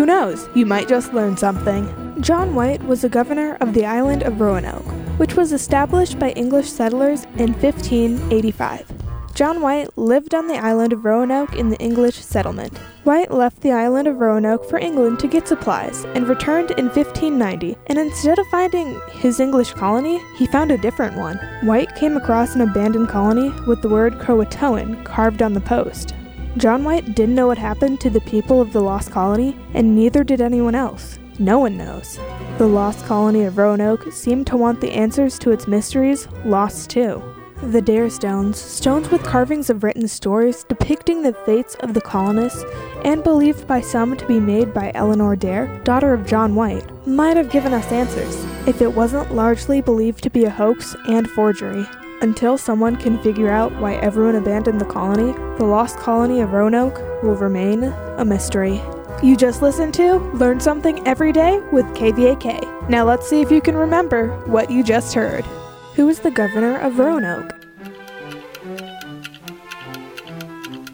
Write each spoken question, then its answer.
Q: Who is the governor of Roanoke?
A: John White was the governor of Roanoke.